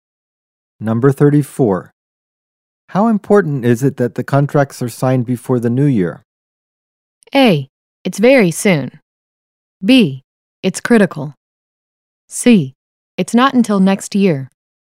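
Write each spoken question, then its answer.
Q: How important is it that the contracts are signed before the new year?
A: B: It's critical.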